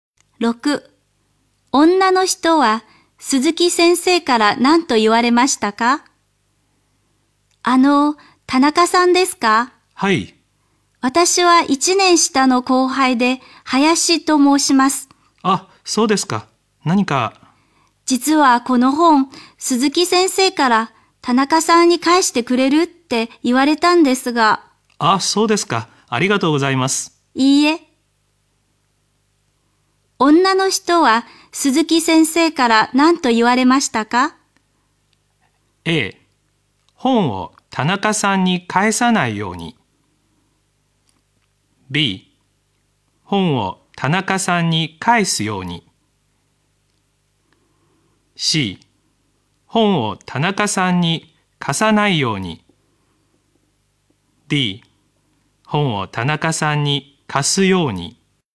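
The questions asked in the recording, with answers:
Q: 女の人は鈴木先生から何と言われましたか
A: B: 本を田中さんに返すように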